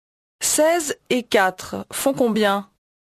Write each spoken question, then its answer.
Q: 16 et 4 font combien?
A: 20.